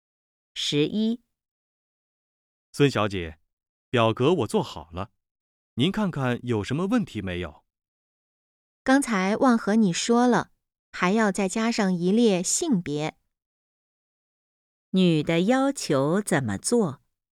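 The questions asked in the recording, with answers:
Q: 女的要求怎么做?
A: 在表格里加上一列性别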